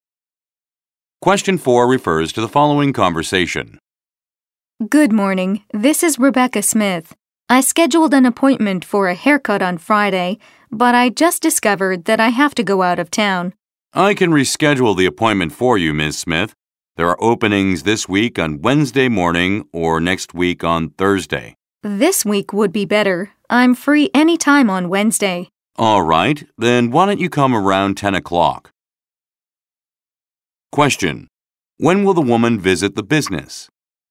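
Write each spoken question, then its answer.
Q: When will the woman visit the business?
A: On Wednesday morning, around 10 o'clock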